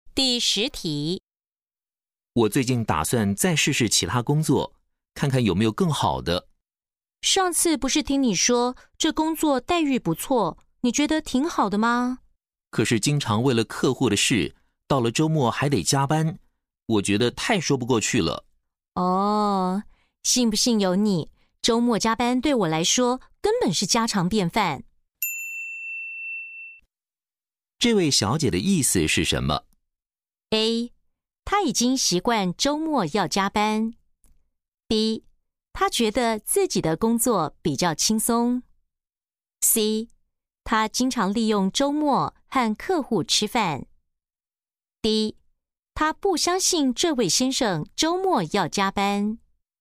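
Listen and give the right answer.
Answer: A: 他已经习惯周末要加班。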